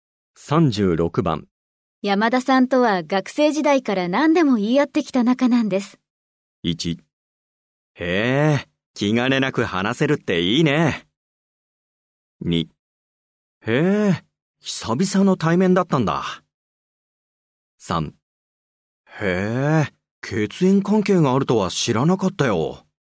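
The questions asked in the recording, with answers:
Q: 山田さんとは学生時代から何でも言い合ってきた仲なんです。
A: 1: へえ、気兼ねなく話せるっていいね。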